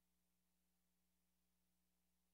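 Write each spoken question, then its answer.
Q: What does the man imply?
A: He can't help with the homework tonight.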